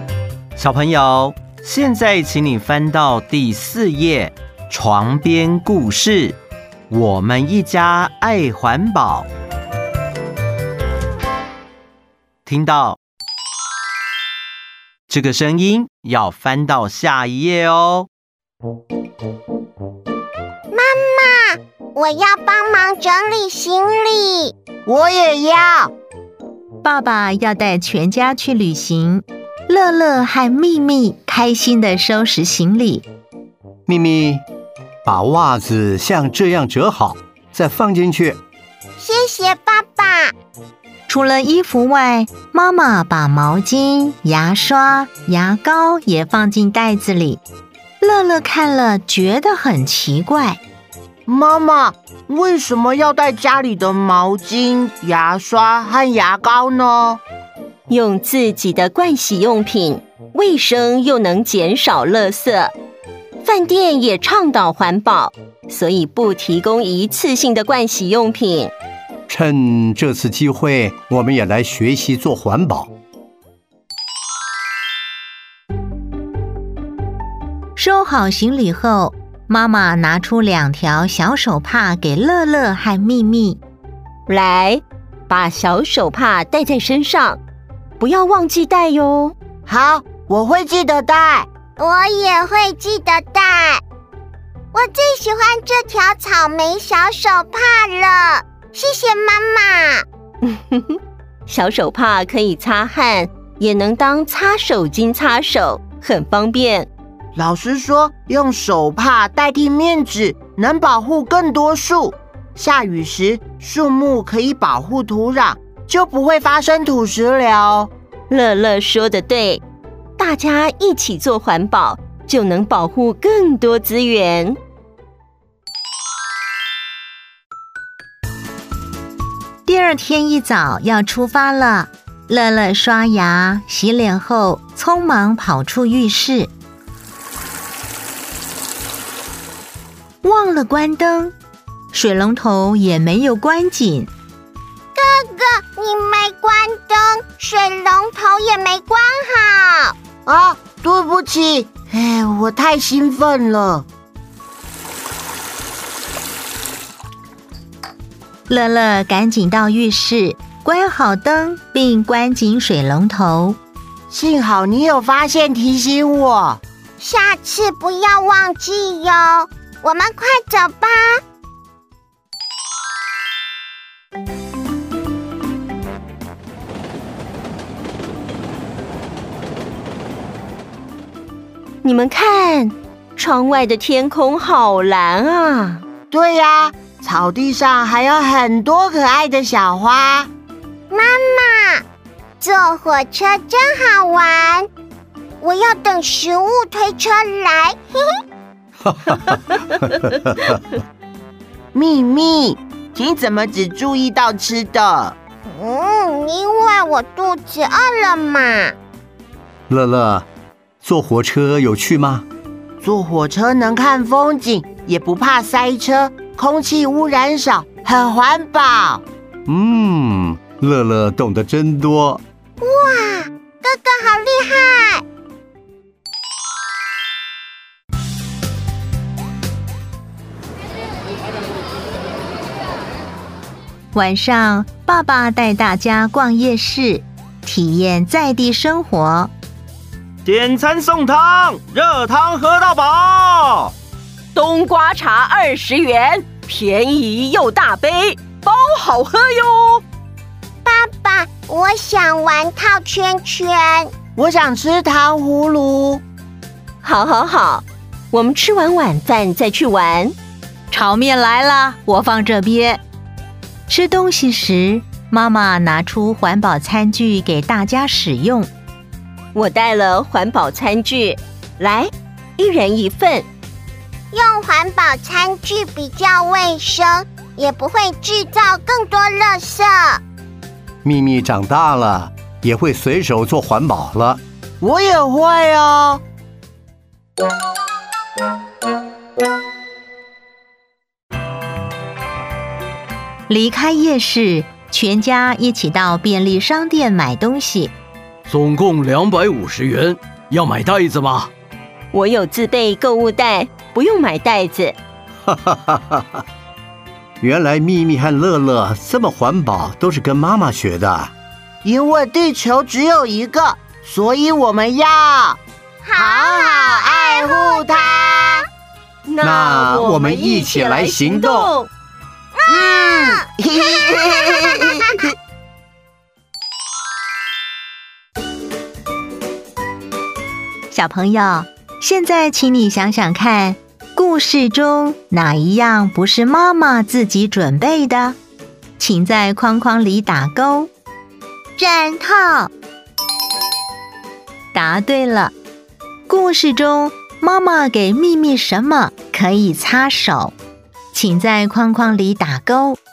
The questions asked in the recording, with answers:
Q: 故事中妈妈给秘密什么可以擦手?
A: 小手帕。